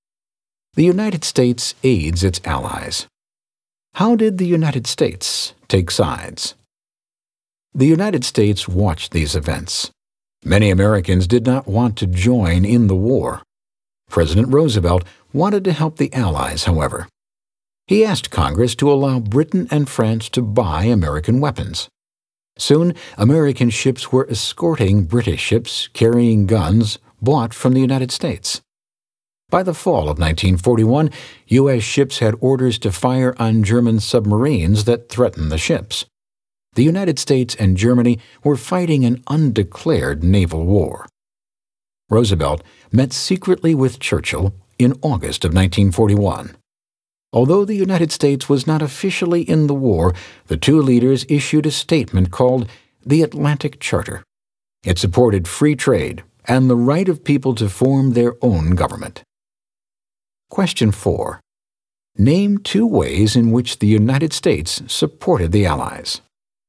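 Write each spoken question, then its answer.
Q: Name two ways in which the United States supported the Allies.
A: It let Britain and France buy American weapons and escorted British ships carrying those weapons (it also fired on German submarines and issued the Atlantic Charter)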